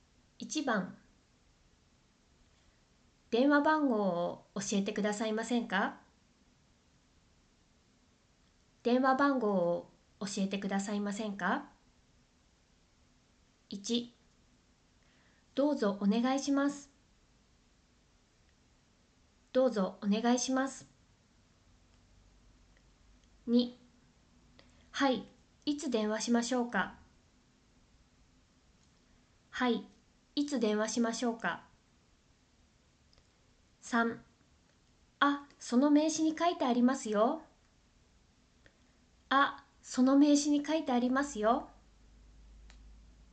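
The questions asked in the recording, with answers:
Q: 電話番号を教えてくださいませんか?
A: 3: あ、その名刺に書いてありますよ。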